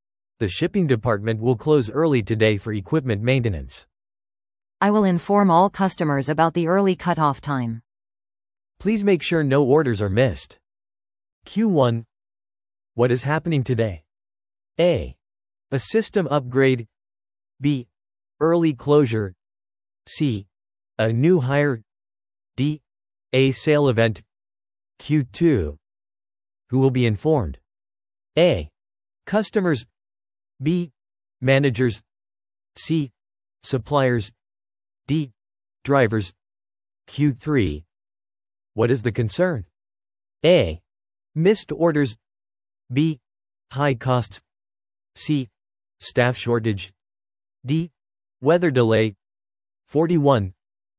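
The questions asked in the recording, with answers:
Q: What is happening today?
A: B: Early closure.

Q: Who will be informed?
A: A: Customers.

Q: What is the concern?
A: A: Missed orders.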